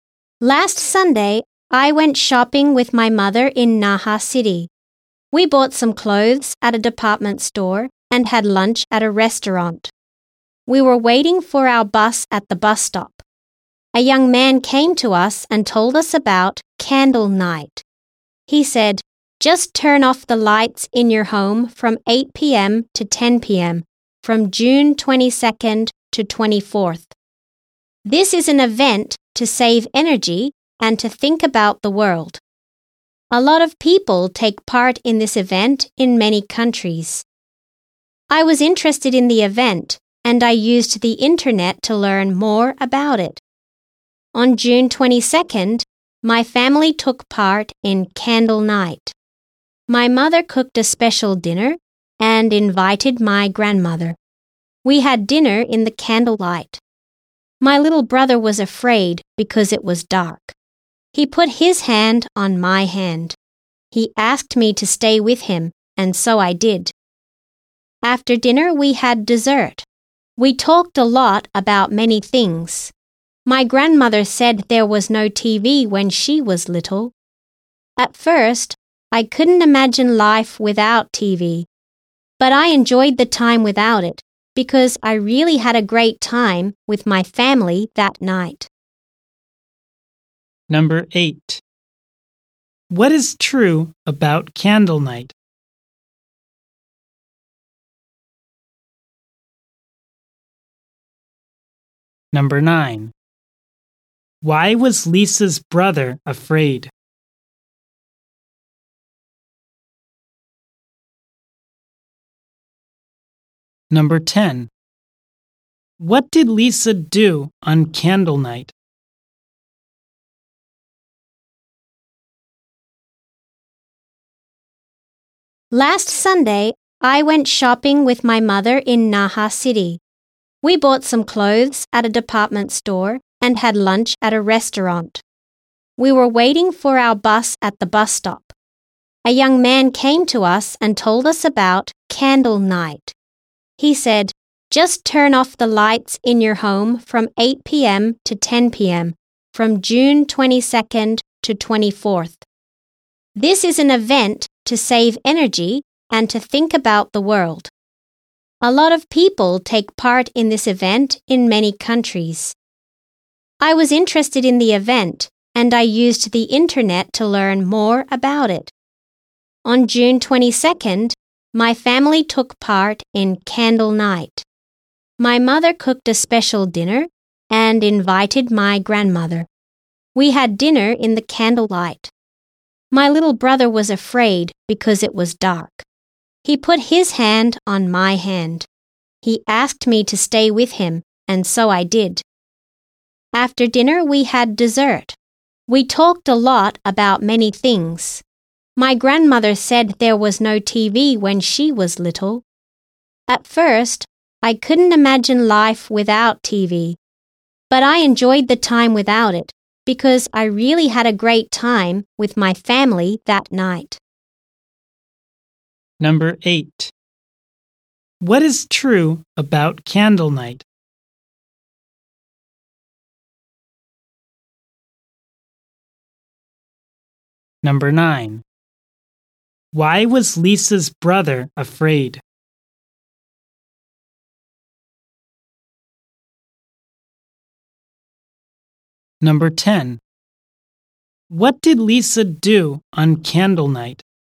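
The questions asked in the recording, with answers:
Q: Why was Lisa's brother afraid?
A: Because it was dark.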